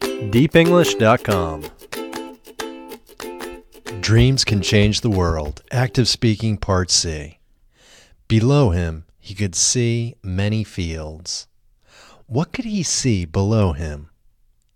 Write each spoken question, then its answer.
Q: What could he see below him?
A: He could see many fields below him.